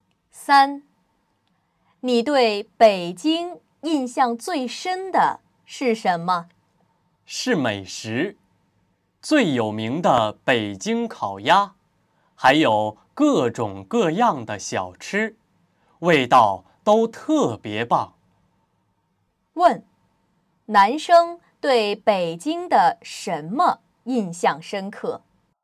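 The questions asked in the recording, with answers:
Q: 问,男生对北京的什么印象深刻?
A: 美食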